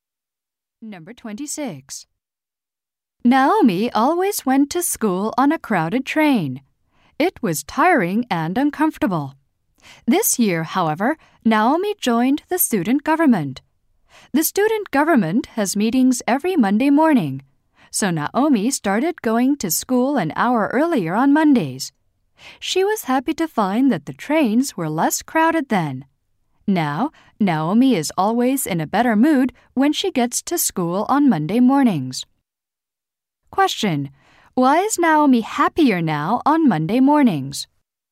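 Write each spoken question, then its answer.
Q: Why is Naomi happier now on Monday mornings?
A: The trains are less crowded then.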